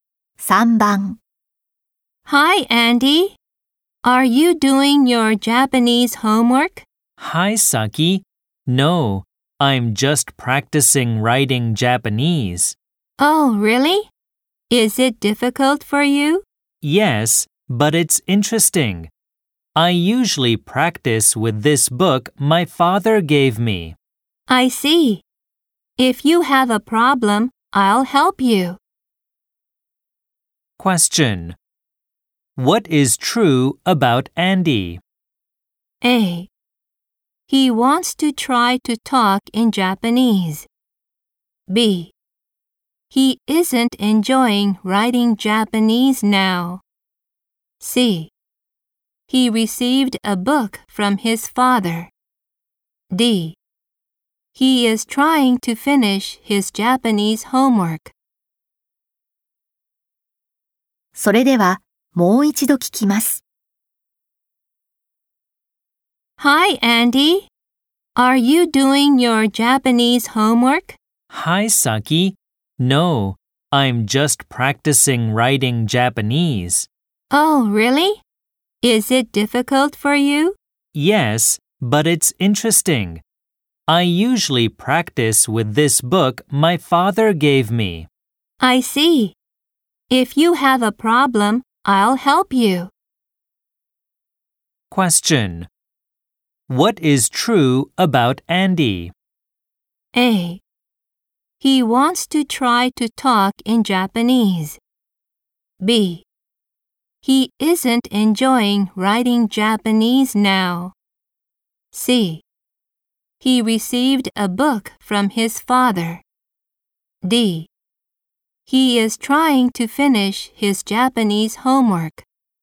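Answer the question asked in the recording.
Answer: C: He received a book from his father.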